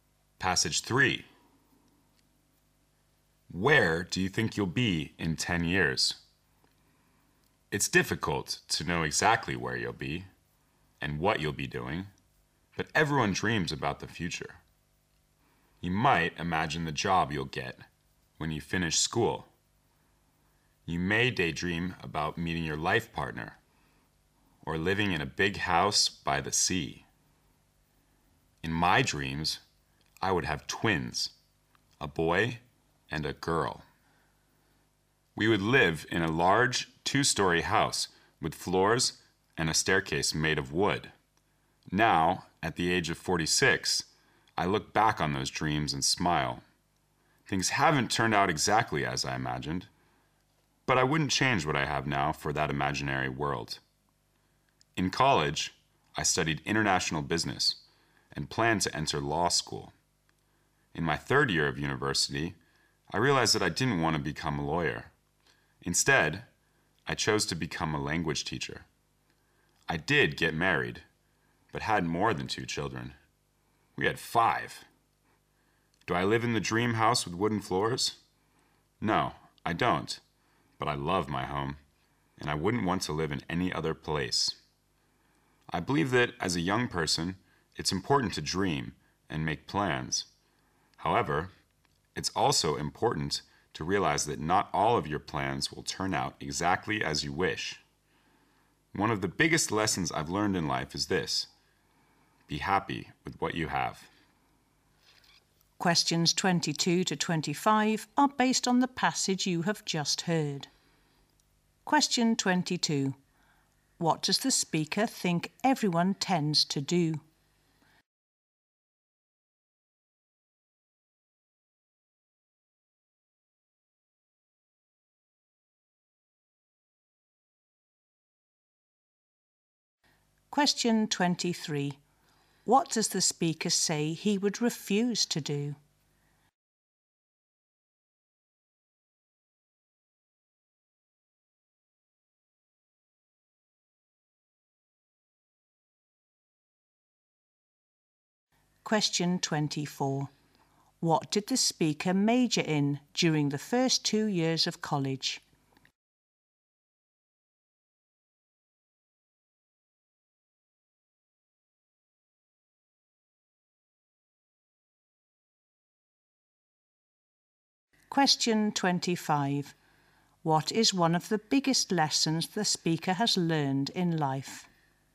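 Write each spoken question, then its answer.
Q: What does the speaker think everyone tends to do?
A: Dream about the future

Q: What does the speaker say he would refuse to do?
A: Trade what he has now for his imaginary dream world

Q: What did the speaker major in during the first 2 years of college?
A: International business

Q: What is one of the biggest lessons the speaker has learned in life?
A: Be happy with what you have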